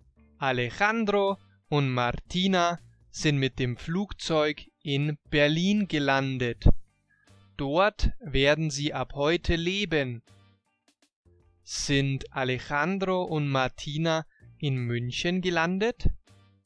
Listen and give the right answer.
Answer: Nein, sie sind nicht in München gelandet, sondern in Berlin.